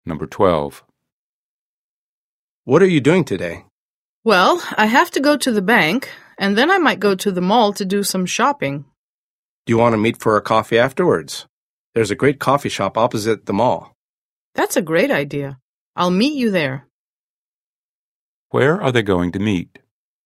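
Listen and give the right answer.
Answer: At the coffee shop opposite the mall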